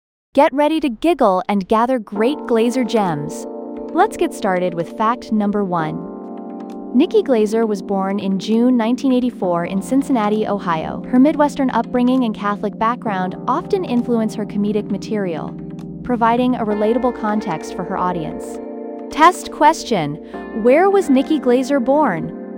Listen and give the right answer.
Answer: Cincinnati, Ohio.